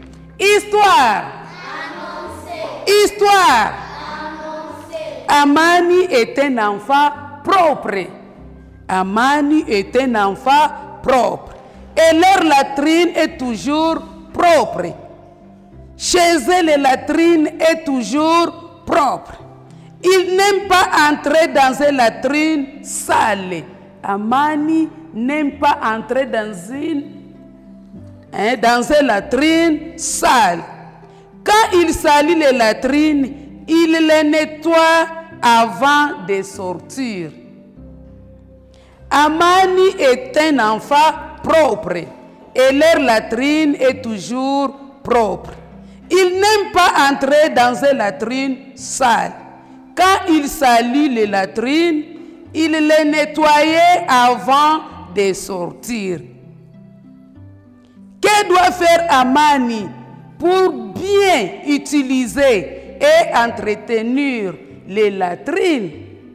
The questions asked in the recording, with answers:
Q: Que doit faire Amani pour bien utiliser et entretenir les latrines?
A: Il va nettoyer les latrines.